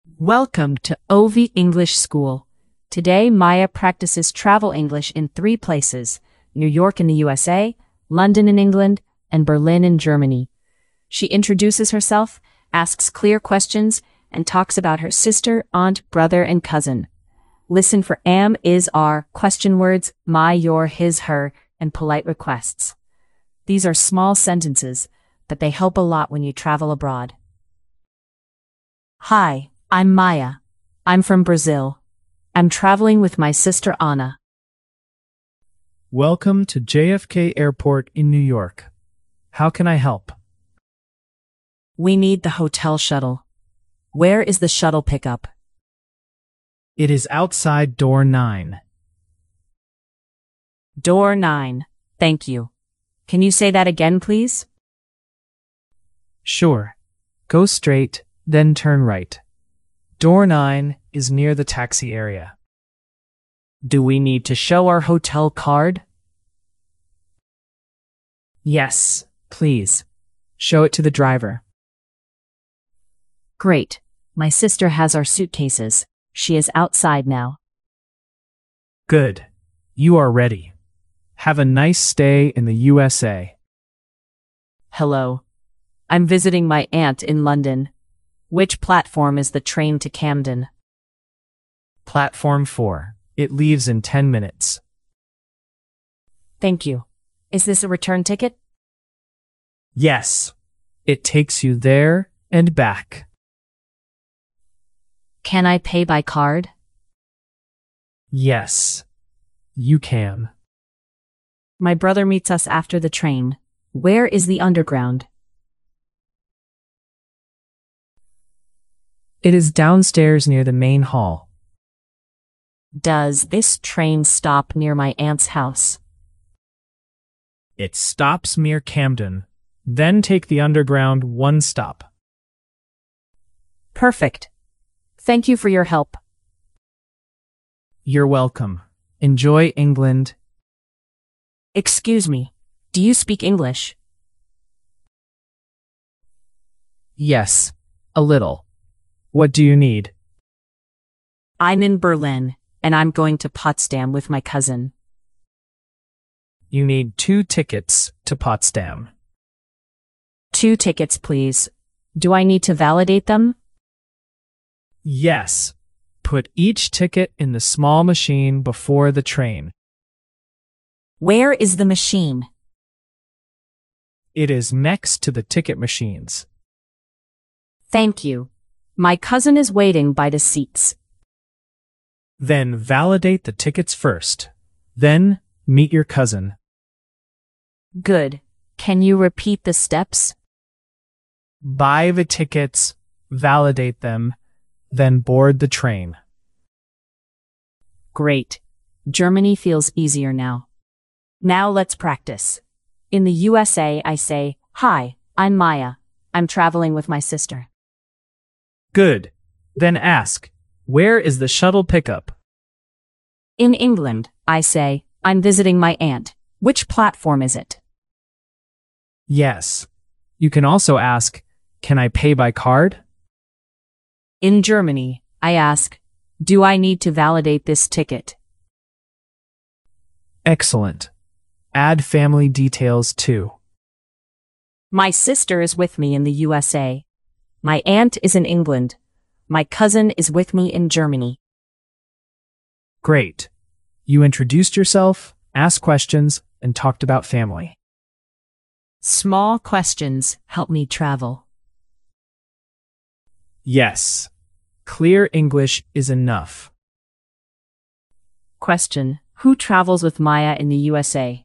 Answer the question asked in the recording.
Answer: She travels with her sister Anna.